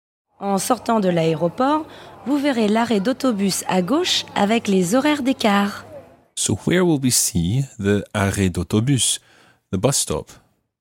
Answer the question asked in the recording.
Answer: It's on the left.